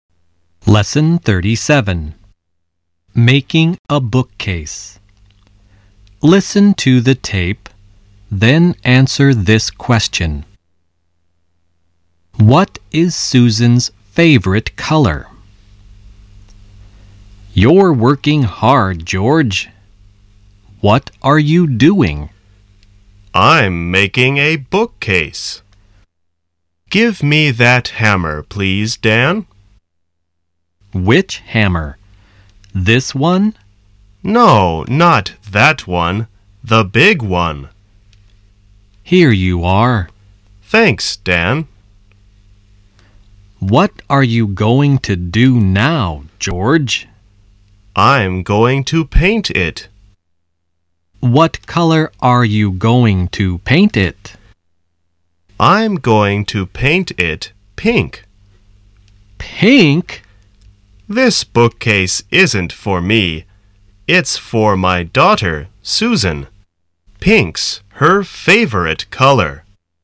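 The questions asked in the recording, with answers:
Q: What is Susan's favorite color?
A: Pink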